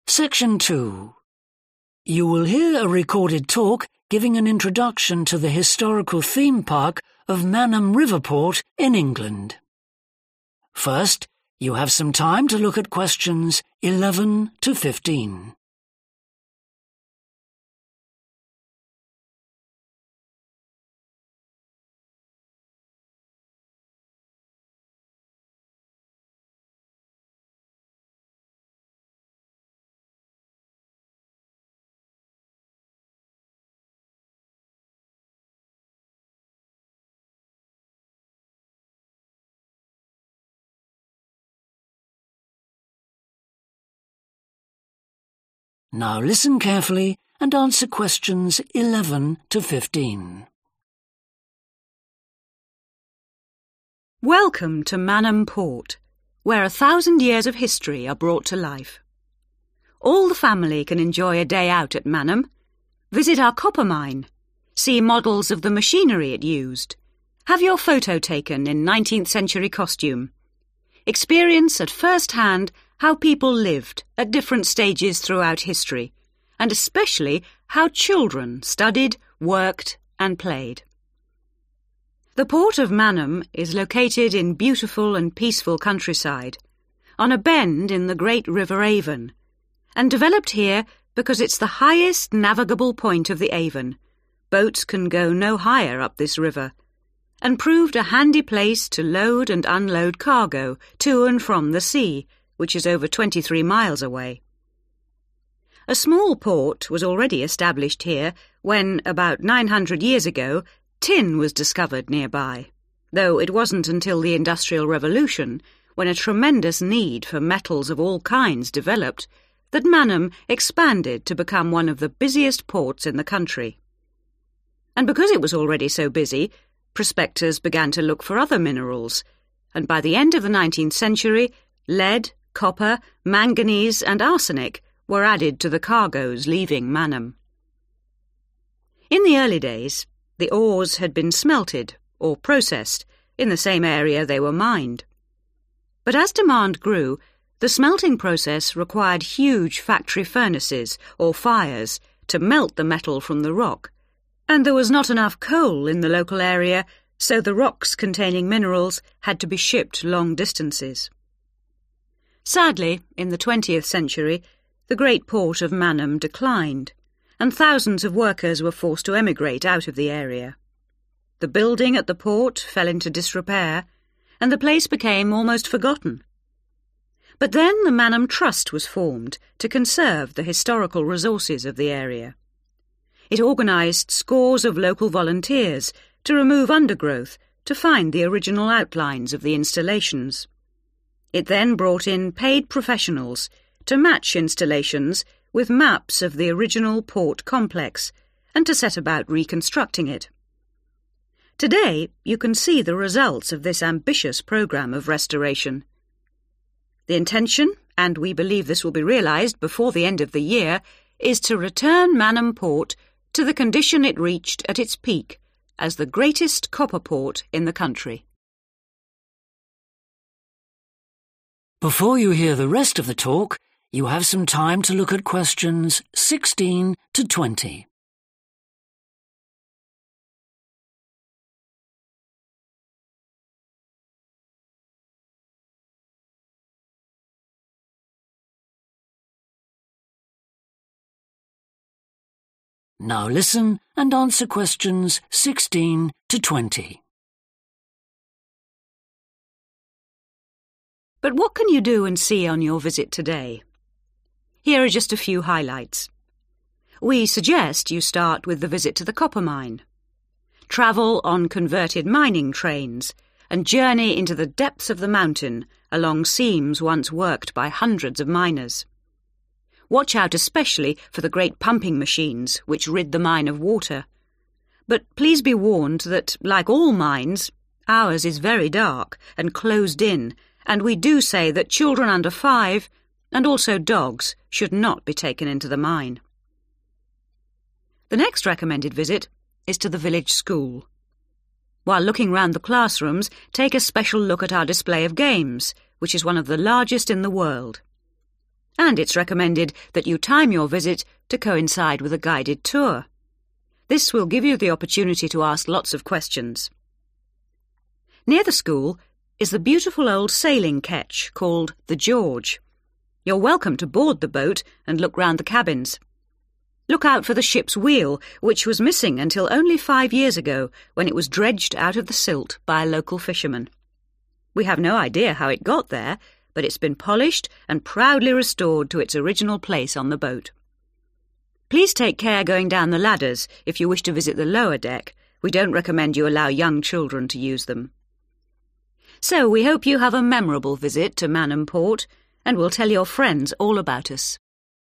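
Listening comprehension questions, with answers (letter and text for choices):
Choose the correct letter, A, B or C.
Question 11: Why did a port originally develop at Manham?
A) It was safe from enemy attack.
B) It was convenient for river transport.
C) It had a good position on the sea coast.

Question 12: What caused Manham's sudden expansion during the Industrial Revolution?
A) the improvement in mining techniques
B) the increase in demand for metals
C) the discovery of tin in the area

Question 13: Why did rocks have to be sent away from Manham to be processed?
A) shortage of fuel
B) poor transport systems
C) lack of skills among local people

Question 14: What happened when the port declined in the twentieth century?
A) The workers went away.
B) Traditional skills were lost.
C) Buildings were used for new purposes.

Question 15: What did the Manham Trust hope to do?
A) discover the location of the original port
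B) provide jobs for the unemployed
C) rebuild the port complex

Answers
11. B) It was convenient for river transport.
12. B) the increase in demand for metals
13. A) shortage of fuel
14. A) The workers went away.
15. C) rebuild the port complex

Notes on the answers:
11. The port of Manham is located in beautiful and peaceful countryside, on a bend in the great River Avon, and developed here because it's the highest navigable point of the Avon – boats can go no higher up this river – and proved a handy place to load and unload cargo to and from the sea (và được phát triển ở đây vì đây là điểm có thể thông thuyền cao nhất của Avon – tàu thuyền không thể đi lên cao hơn trên con sông này – và nó đã chứng tỏ là một nơi thuận tiện để bốc dỡ hàng hóa đến và đi từ biển), which is over 23 miles away.
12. A small port was already established here when, about 900 years ago, tin was discovered nearby, though it wasn't until the Industrial Revolution, when a tremendous need for metals of all kinds developed, that Manham expanded to become one of the busiest ports in the country. 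(mặc dù phải đến Cách mạng Công nghiệp, khi nhu cầu về các loại kim loại tăng lên, Manham mới mở rộng ra, trở thành một trong những cảng tấp nập nhất nhất trên cả nước.)
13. But, as demand grew, the smelting process required huge factory furnaces or fires to melt the metal from the rock and there was not enough coal in the local area, so the rocks containing minerals had to be shipped long distances. (không có đủ than ở khu vực địa phương, vậy nên những hòn đá chứa khoáng chất cần phải được vận chuyển đi một quãng đường dài)
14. Sadly, in the twentieth century, the great port of Manham declined, and thousands of workers were forced to emigrate out of the area. (vào thế kỷ 20, cảng lớn Manham suy tàn và hàng nghìn công nhân buộc phải di cư ra khỏi khu vực.)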